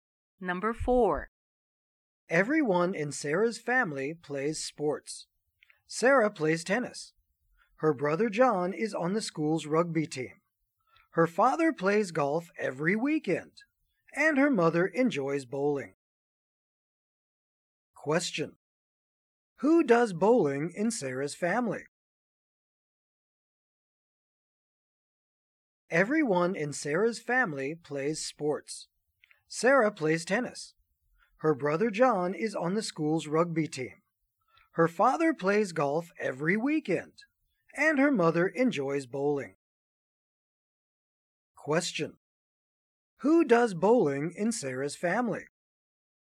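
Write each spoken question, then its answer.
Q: Who does bowling in Sarah's family?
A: Her mother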